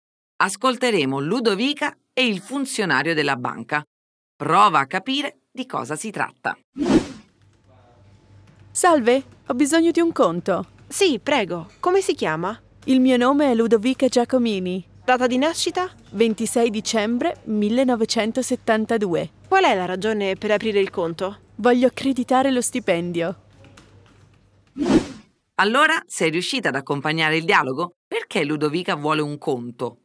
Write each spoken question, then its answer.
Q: Perché Ludovica vuole un conto?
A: Sì, Ludovica vuole che il suo stipendio arrivi su questo nuovo conto che sta per aprire.